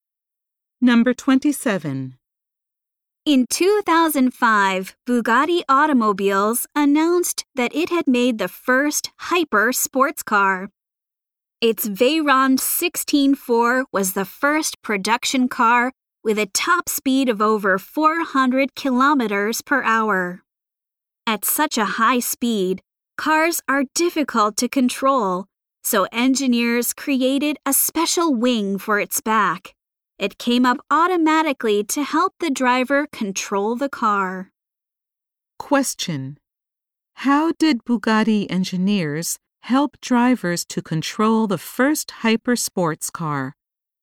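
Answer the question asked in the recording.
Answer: They created a special wing for its back that came up automatically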